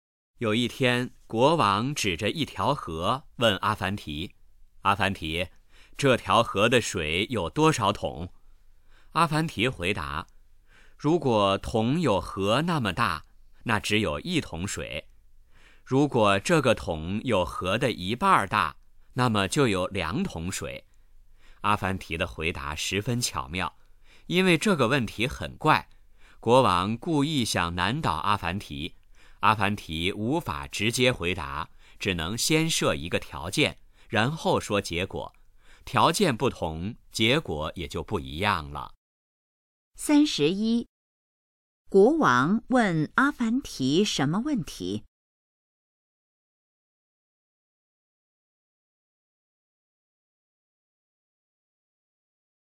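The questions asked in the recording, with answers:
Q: 国王问阿凡提什么问题?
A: 这条河的水有多少桶

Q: 国王为什么问阿凡提那个问题?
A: 故意想难倒阿凡提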